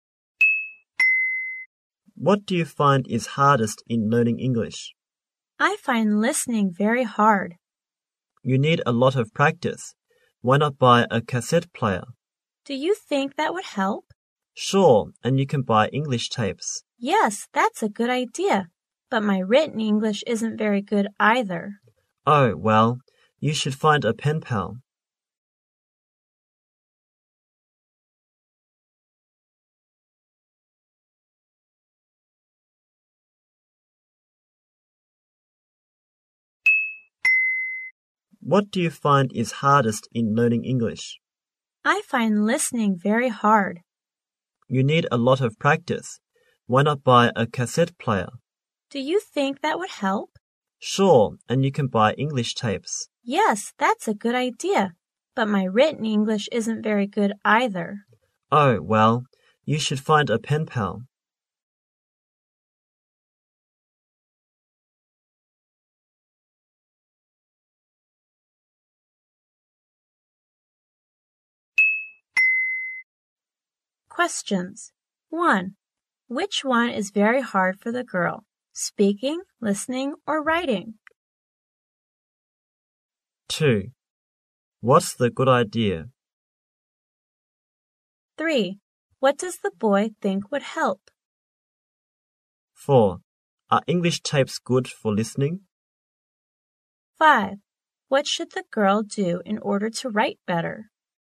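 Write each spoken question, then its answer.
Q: Which one is very hard for the girl?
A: Listening

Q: Are English tapes good for listening?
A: Yes

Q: What should the girl do in order to write better?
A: Find a pen pal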